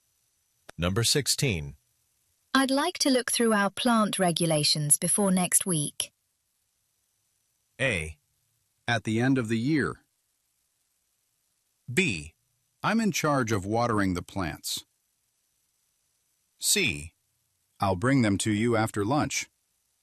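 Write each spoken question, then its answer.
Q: I'd like to look through our plant regulations before next week.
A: C: I'll bring them to you after lunch.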